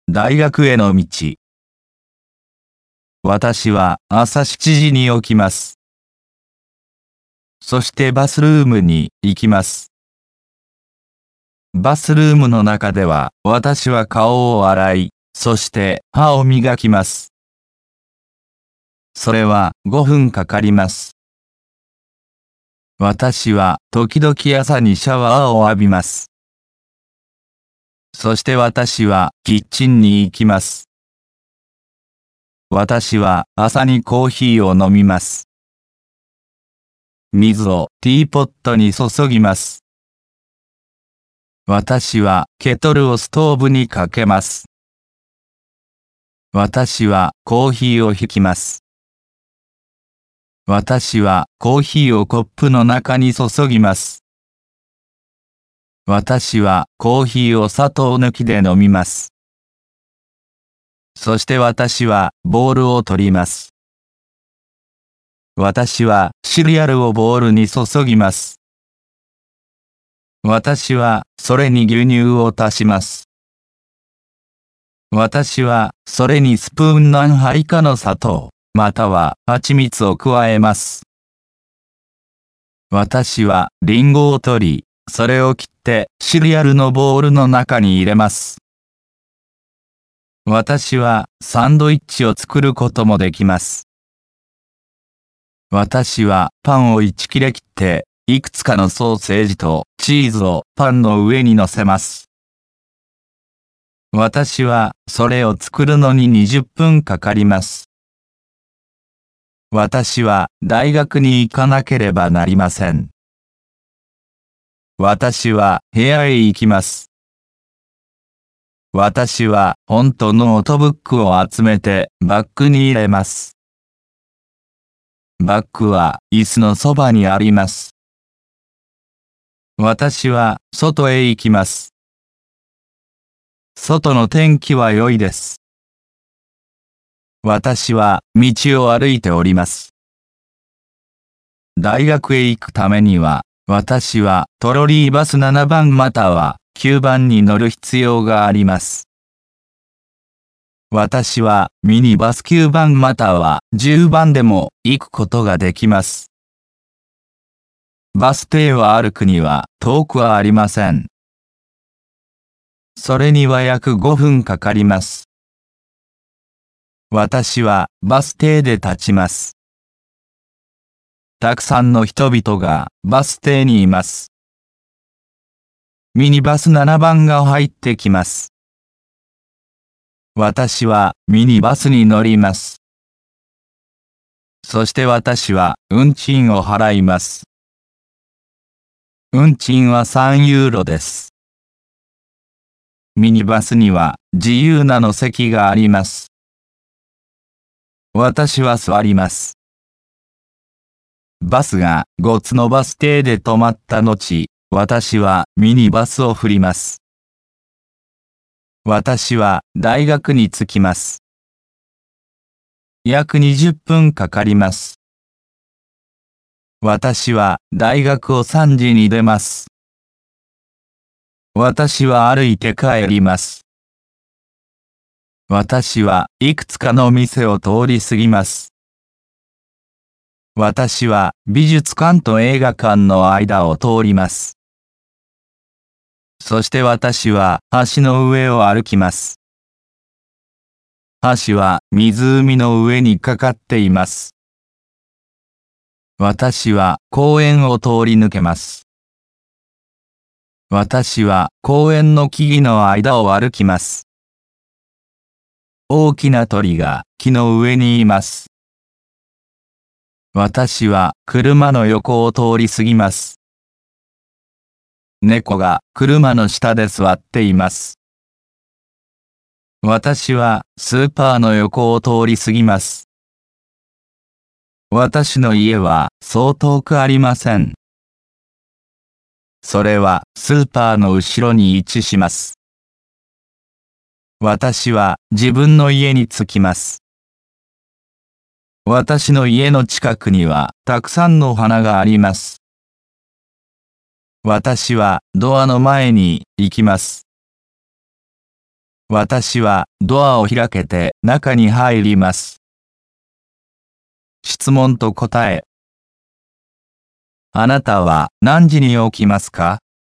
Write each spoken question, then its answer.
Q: あなたは何時に起きますか?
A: 私は朝7時に起きます。